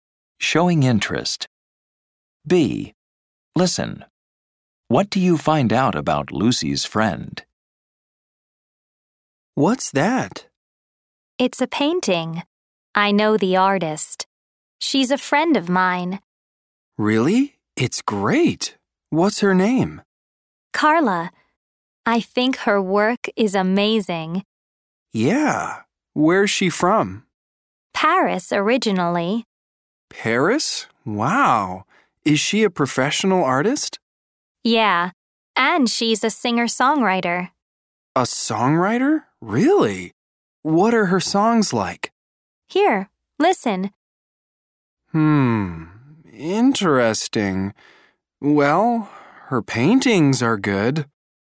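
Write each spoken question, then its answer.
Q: What do you find out about Lucy's friend?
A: Her name is Carla. She's from Paris, and she's a professional artist and a singer-songwriter.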